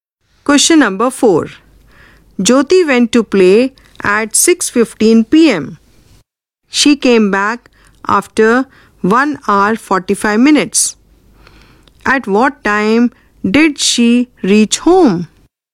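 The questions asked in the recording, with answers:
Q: At what time did she reach home?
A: 8:00 p.m.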